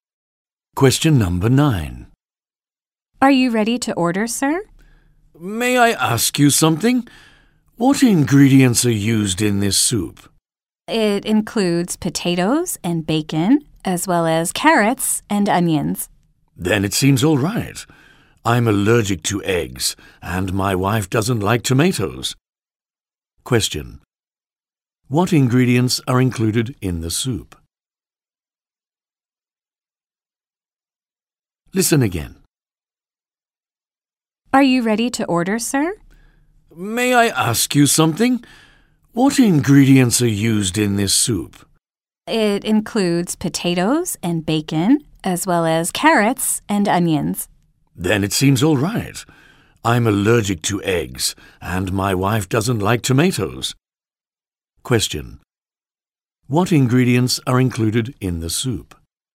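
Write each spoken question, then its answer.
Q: Question. What ingredients are included in the soup?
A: Potatoes, bacon, carrots and onions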